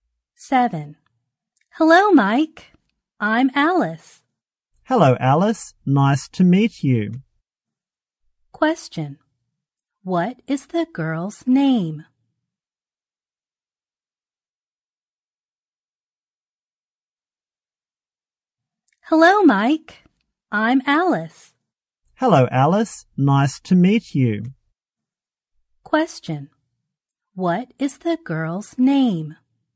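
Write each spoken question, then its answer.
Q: What is the girl's name?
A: Alice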